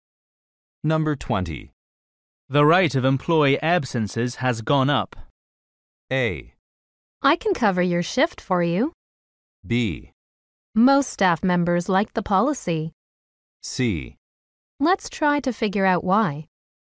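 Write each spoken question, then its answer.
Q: The rate of employee absences has gone up.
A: C: Let's try to figure out why.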